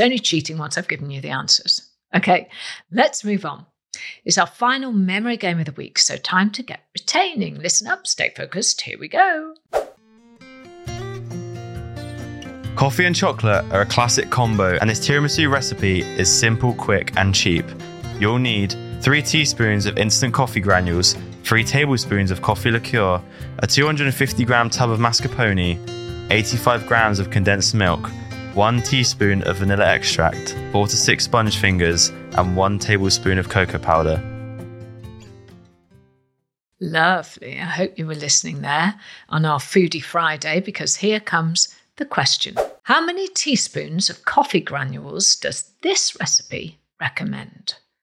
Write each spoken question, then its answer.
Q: How many teaspoons of coffee granules does this recipe recommend?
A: The answer is 3 teaspoons.